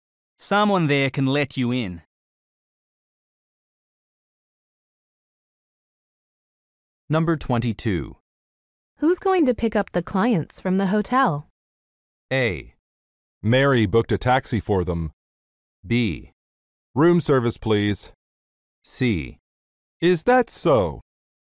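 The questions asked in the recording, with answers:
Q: Who's going to pick up the clients from the hotel?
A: A: Mary booked a taxi for them.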